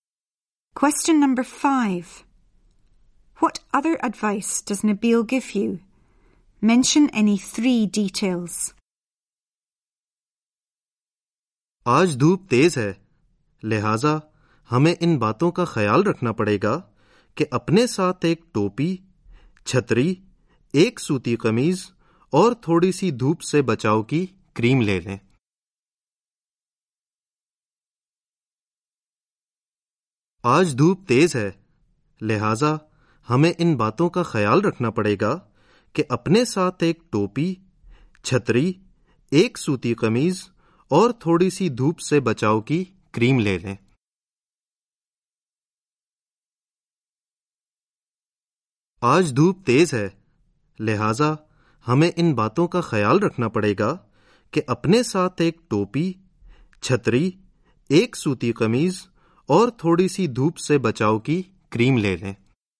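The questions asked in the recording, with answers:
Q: What other advice does Nabil give you?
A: The sun is strong, so take a hat, an umbrella, a cotton shirt and some sun cream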